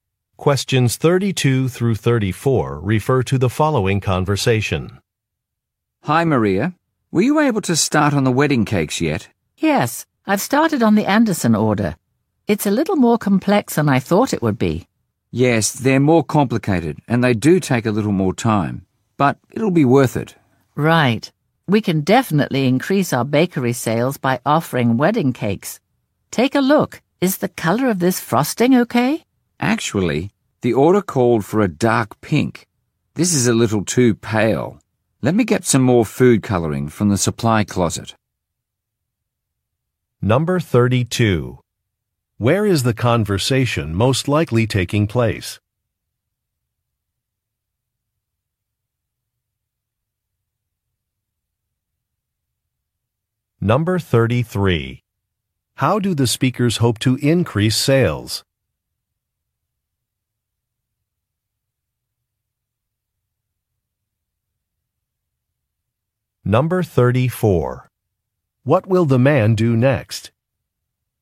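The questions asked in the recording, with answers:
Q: Where is the conversation most likely taking place?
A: At a bakery

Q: How do the speakers hope to increase sales?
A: By offering wedding cakes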